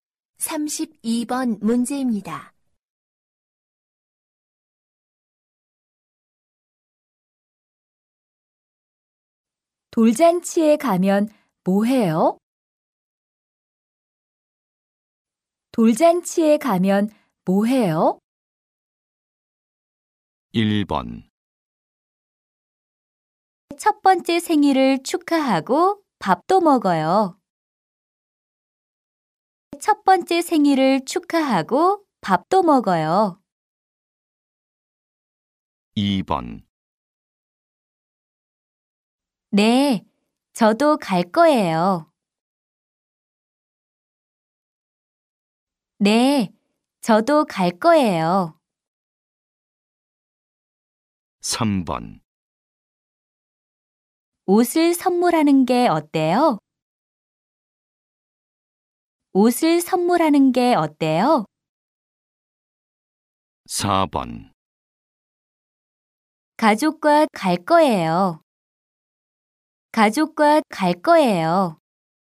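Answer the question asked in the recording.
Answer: 1: 첫 번째 생일을 축하하고 밥도 먹어요.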